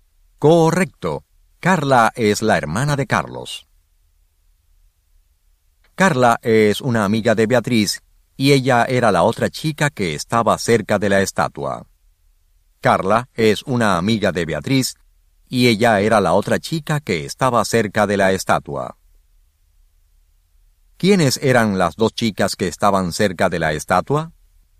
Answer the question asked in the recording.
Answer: Beatriz y Carla eran las dos chicas que estaban cerca de la estatua.